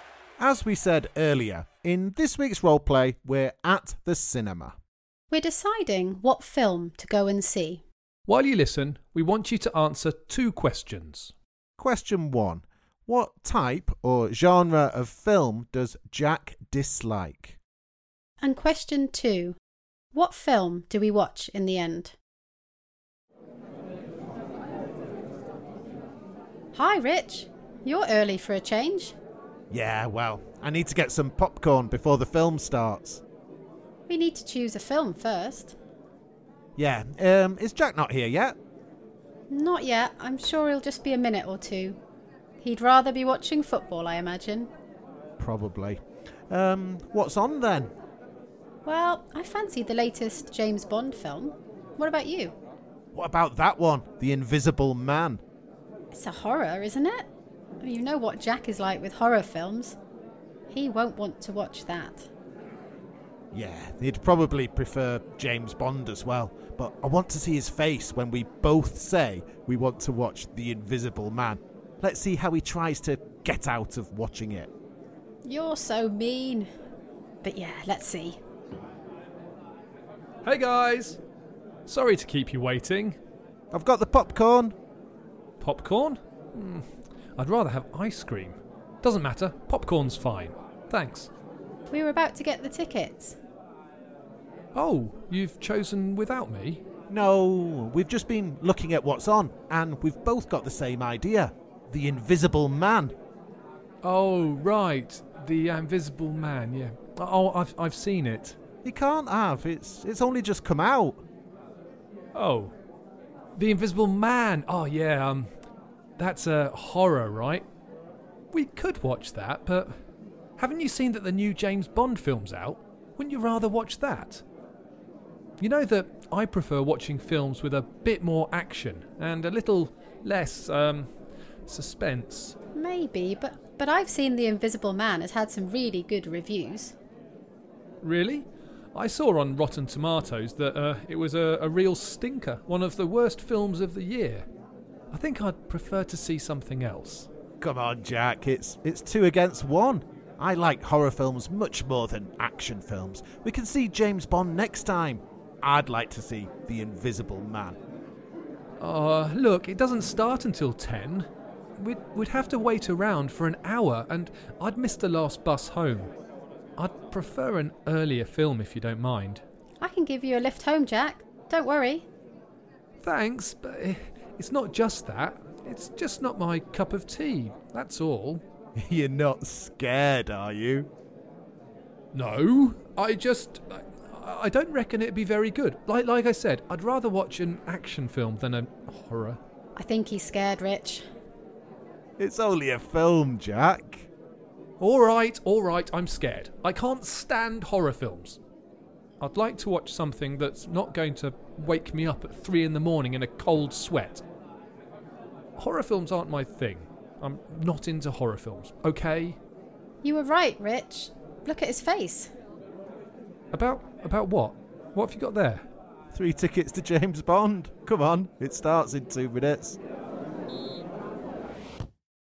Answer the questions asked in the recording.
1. The answer, as I'm sure you know, is horror films.
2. The answer is James Bond